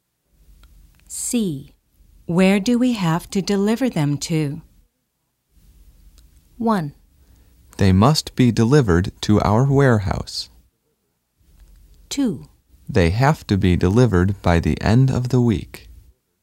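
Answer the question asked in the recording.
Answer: 1: They must be delivered to our warehouse.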